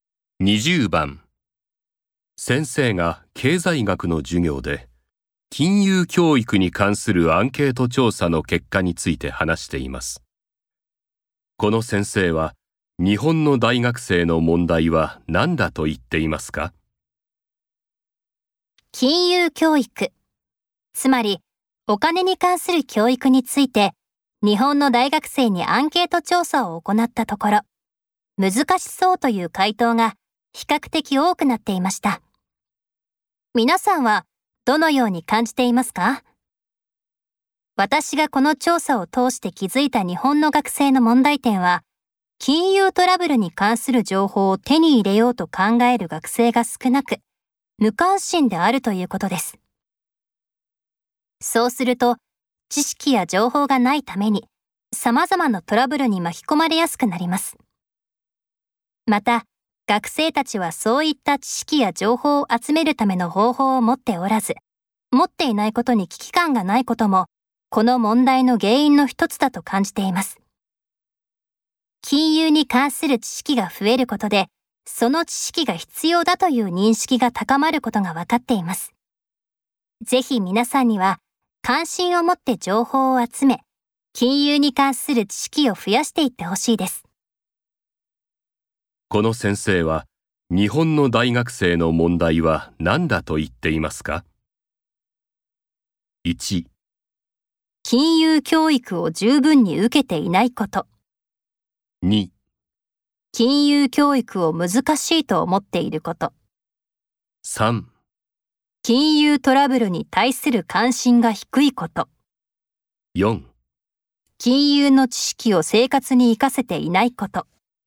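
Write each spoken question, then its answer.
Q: この先生は、日本の大学生の問題は何だと言っていますか?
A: 3: 金融トラブルに対する関心が低いこと。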